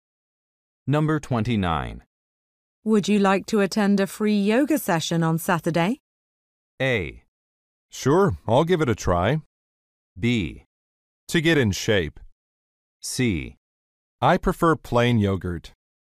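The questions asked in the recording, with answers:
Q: Would you like to attend a free yoga session on Saturday?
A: A: Sure, I'll give it a try.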